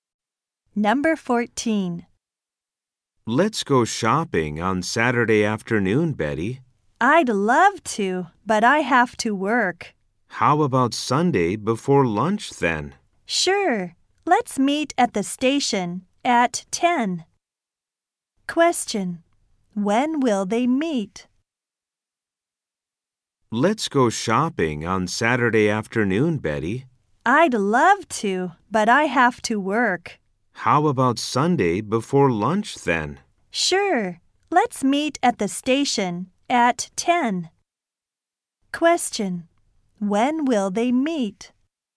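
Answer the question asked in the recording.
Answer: Sunday at 10 (morning)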